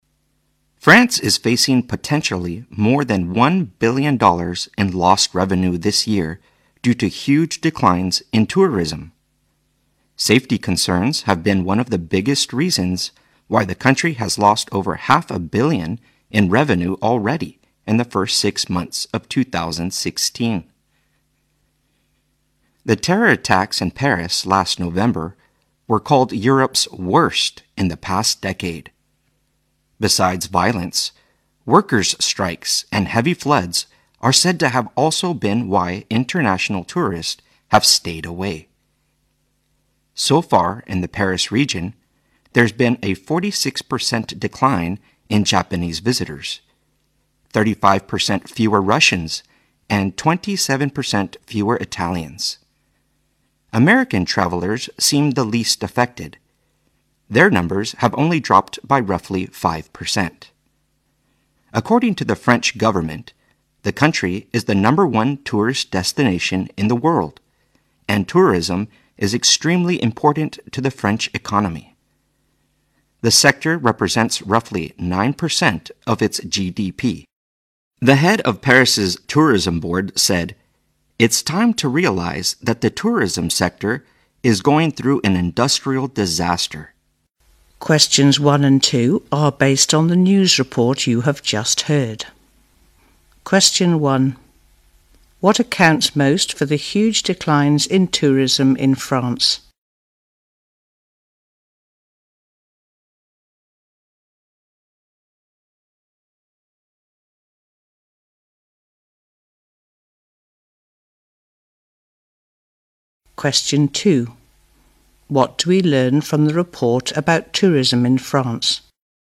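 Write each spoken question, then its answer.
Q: What accounts most for the huge declines in tourism in France?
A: Safety concerns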